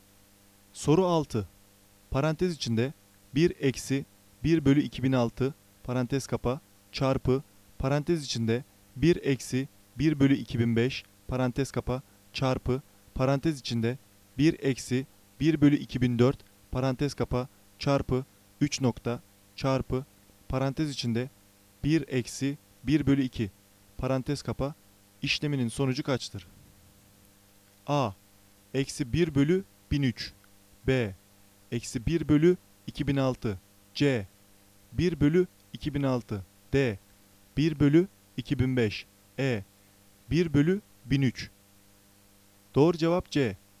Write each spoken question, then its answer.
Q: işleminin sonucu kaçtır?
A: Doğru cevap C. 1 bölü 2006